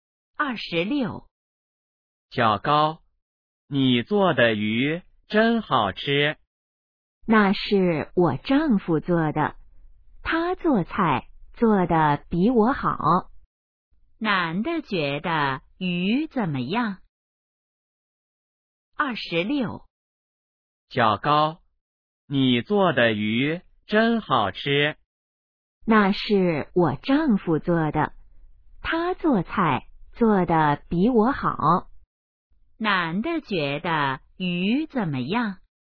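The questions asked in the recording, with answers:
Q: 男的觉得鱼怎么样?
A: 很好吃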